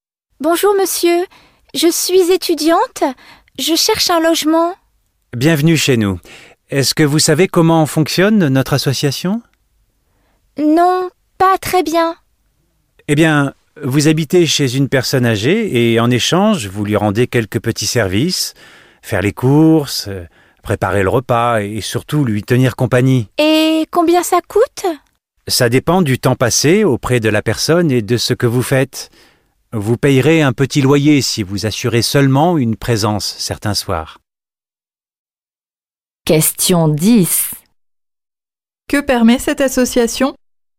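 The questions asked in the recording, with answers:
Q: Que permet cette association?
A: De loger un étudiant chez une personne âgée en échange de petits services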